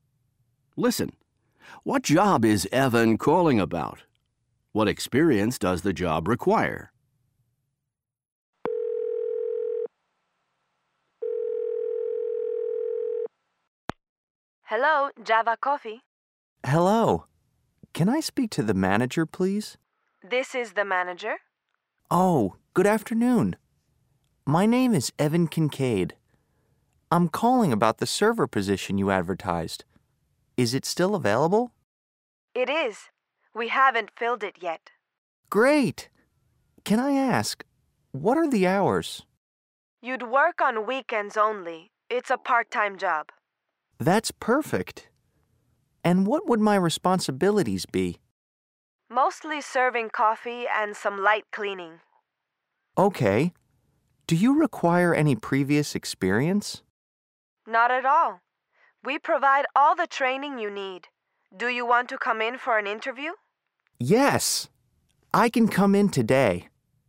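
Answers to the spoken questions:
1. The server position at Java Coffee
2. None; they provide all the training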